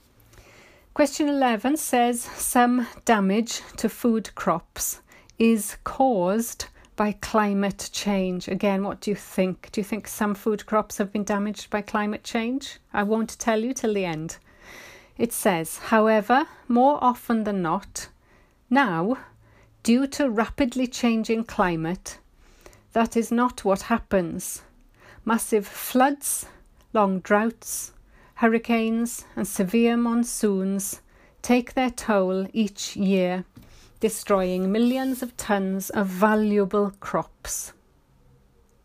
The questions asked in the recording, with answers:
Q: Question 11 says some damage to food crops is caused by climate change.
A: So the answer is true.